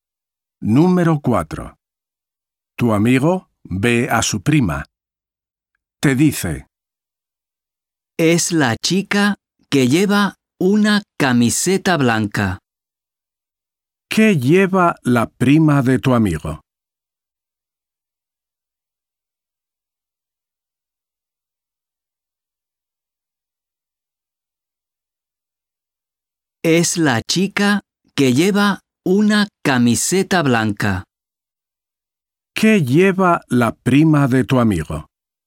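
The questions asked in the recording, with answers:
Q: ¿Qué lleva la prima de tu amigo?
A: una camiseta blanca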